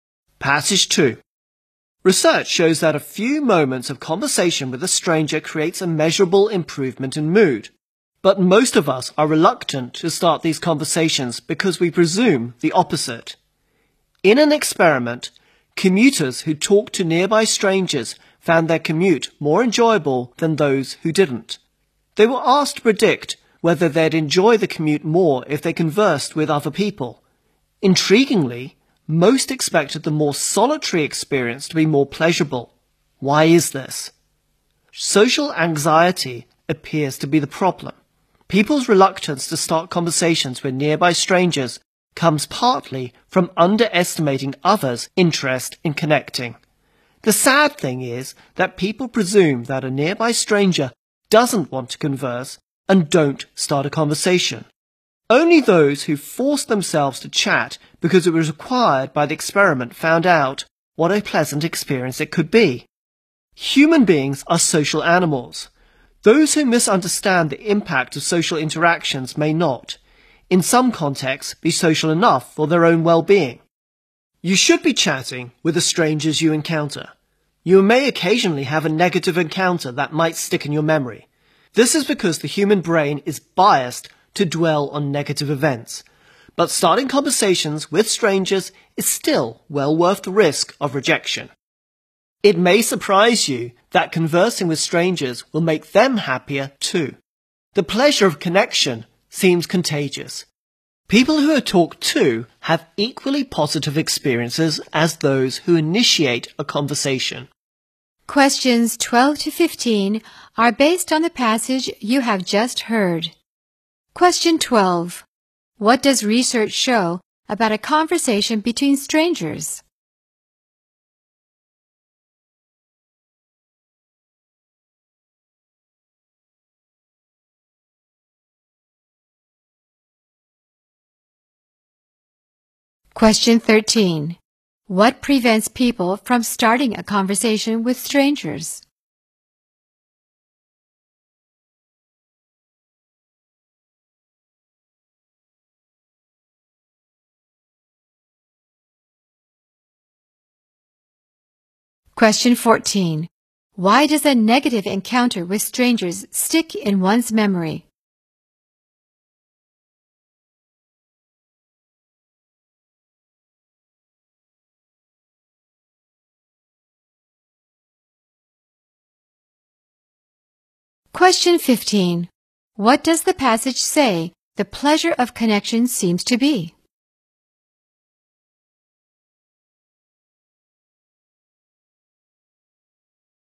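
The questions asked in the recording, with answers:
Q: What does research show about a conversation between strangers?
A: It creates a measurable improvement in mood.

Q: What prevents people from starting a conversation with strangers?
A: Social anxiety: they underestimate others' interest in connecting.

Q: Why does a negative encounter with strangers stick in one's memory?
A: The human brain is biased to dwell on negative events.

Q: What does the passage say the pleasure of connection seems to be?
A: Contagious.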